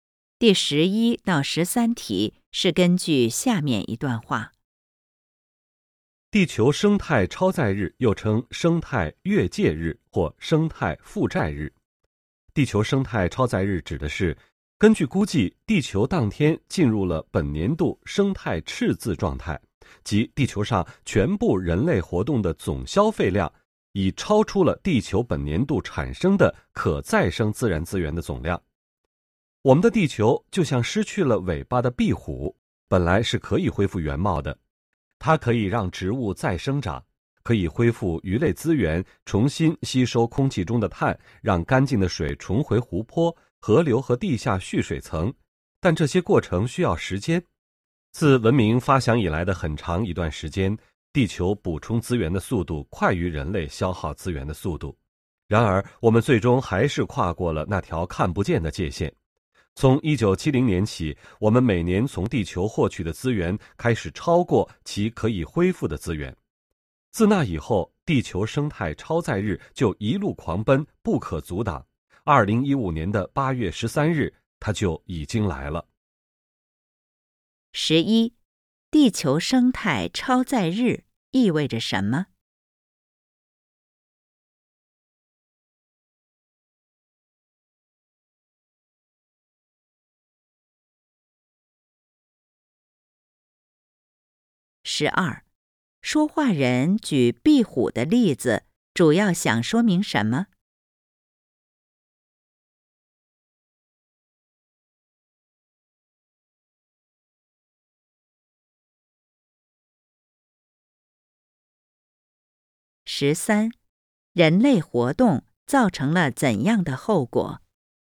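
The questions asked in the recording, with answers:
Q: 地球生态超载日意味着什么?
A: 地球当天进入本年度生态赤字状态,人类总消费量超出地球本年度可再生资源总量

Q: 说话人举壁虎的例子,主要想说明什么?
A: 地球可以恢复资源,但需要时间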